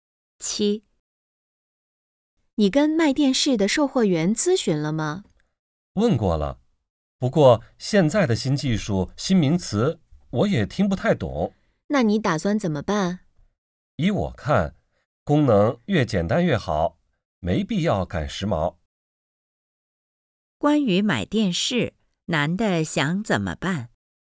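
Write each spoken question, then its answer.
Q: 关于买电视,男的想怎么办?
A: 买功能简单的,不赶时髦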